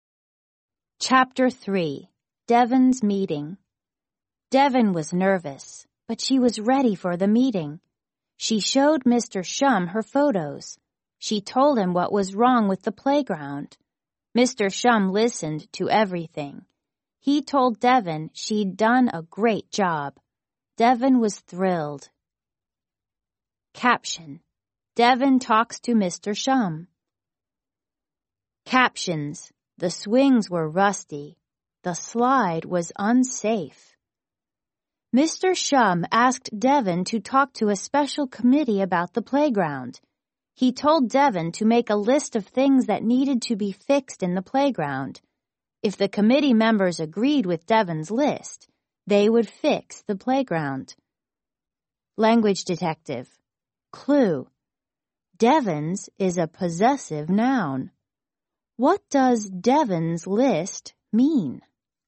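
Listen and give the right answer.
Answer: The list that belongs to Devon (the list Devon made)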